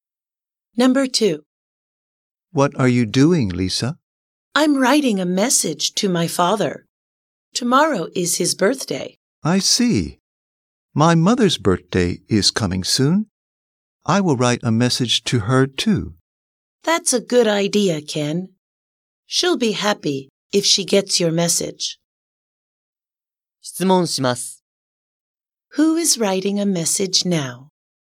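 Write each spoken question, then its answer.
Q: Who is writing a message now?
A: Lisa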